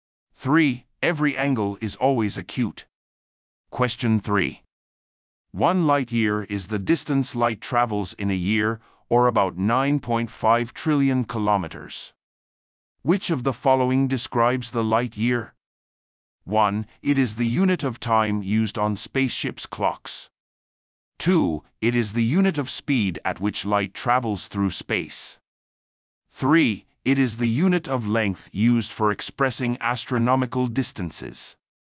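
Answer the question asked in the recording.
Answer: 3: It is the unit of length used for expressing astronomical distances.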